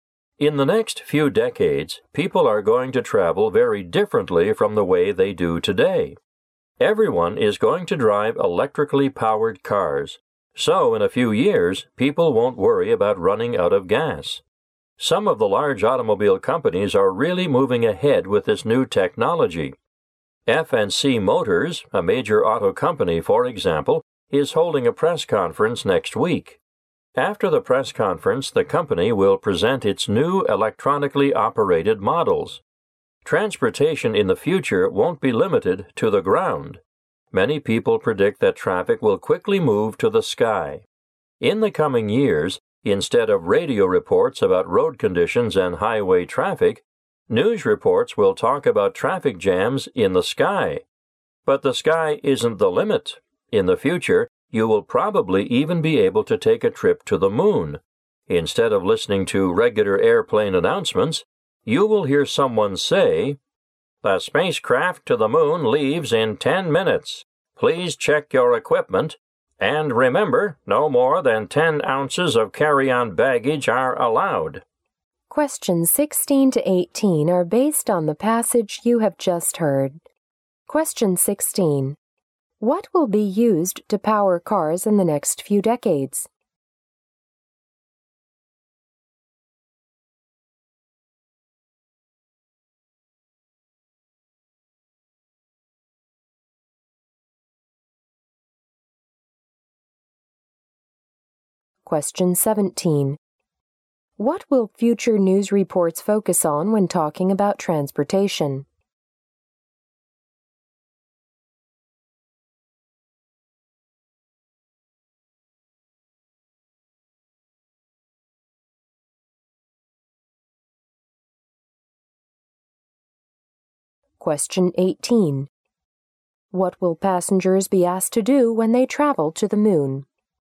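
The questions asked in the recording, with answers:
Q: What will be used to power cars in the next few decades?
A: Electricity.

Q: What will future news reports focus on when talking about transportation?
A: Traffic jams in the sky.

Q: What will passengers be asked to do when they travel to the moon?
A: Check their equipment and carry no more than 10 ounces of baggage.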